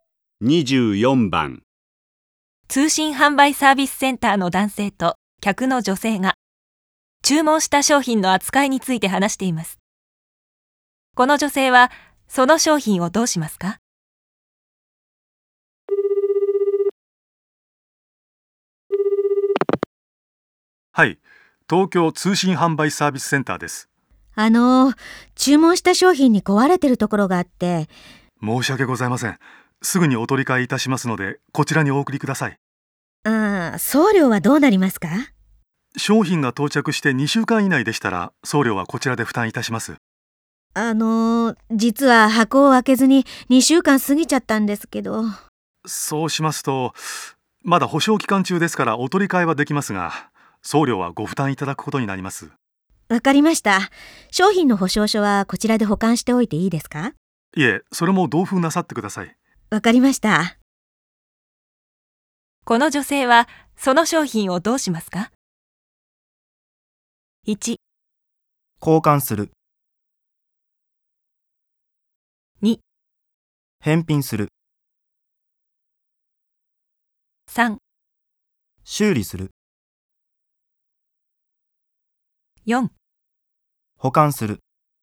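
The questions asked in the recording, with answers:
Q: この女性はその商品をどうしますか?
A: 1: 交換する。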